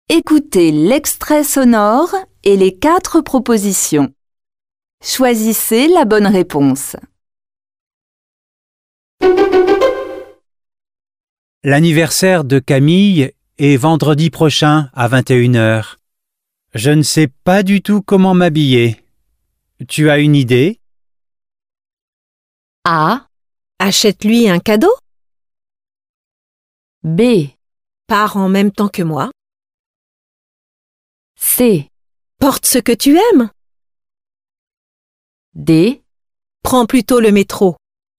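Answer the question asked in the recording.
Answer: C: Porte ce que tu aimes.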